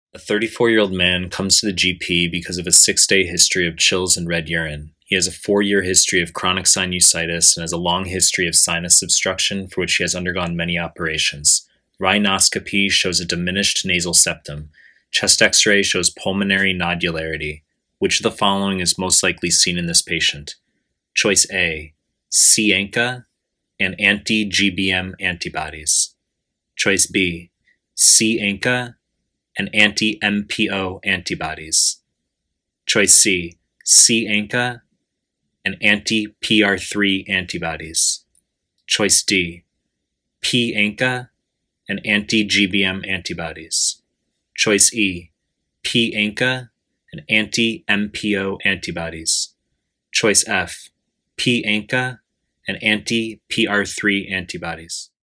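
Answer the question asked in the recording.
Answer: C: Cianca and anti-PR3 antibodies.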